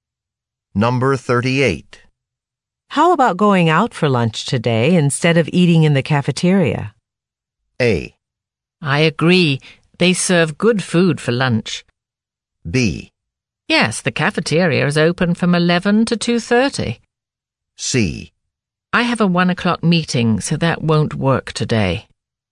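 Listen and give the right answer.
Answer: C: I have a 1 o'clock meeting, so that won't work today.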